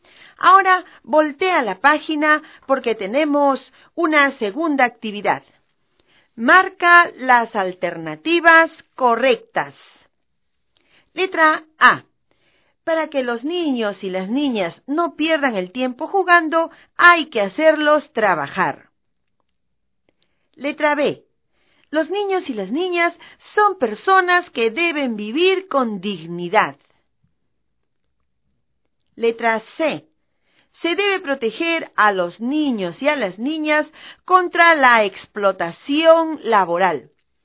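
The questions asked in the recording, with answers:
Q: Marca las alternativas correctas. Letra A. Para que los niños y las niñas no pierdan el tiempo jugando, hay que hacerlos trabajar. Letra B. Los niños y las niñas son personas que deben vivir con dignidad. Letra C. Se debe proteger a los niños y a las niñas contra la explotación laboral.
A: B y C: Los niños y las niñas son personas que deben vivir con dignidad; Se debe proteger a los niños y a las niñas contra la explotación laboral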